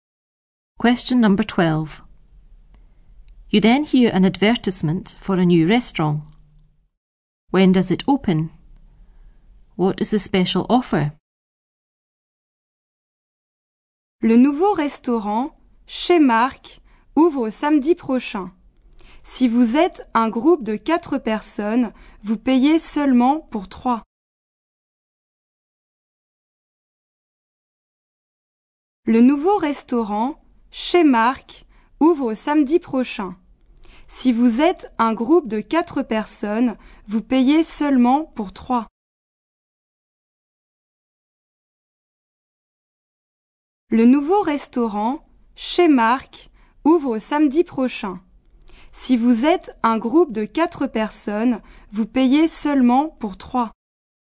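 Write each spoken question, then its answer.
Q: When does it open?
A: Next Saturday

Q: What is the special offer?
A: A group of 4 people pays for only 3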